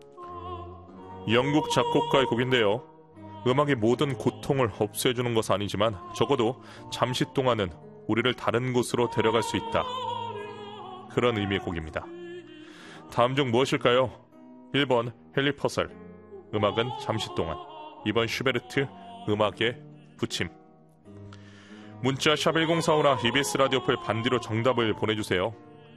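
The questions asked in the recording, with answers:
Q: 다음 중 무엇일까요?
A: 1번: 헨리 퍼셀, 음악은 잠시 동안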